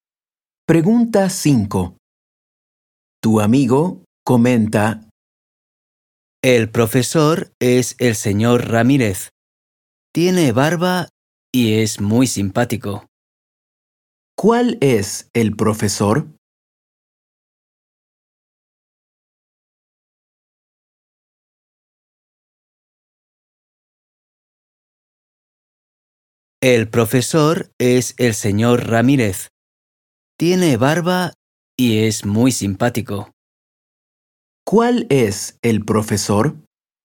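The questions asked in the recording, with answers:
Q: ¿Cuál es el profesor?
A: El señor Ramírez, el que tiene barba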